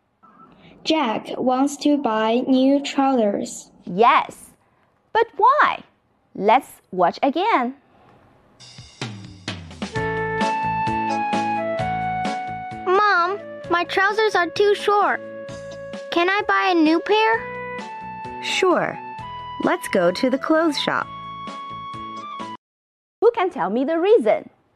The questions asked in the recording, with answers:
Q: Who can tell me the reason?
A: Because they are too short.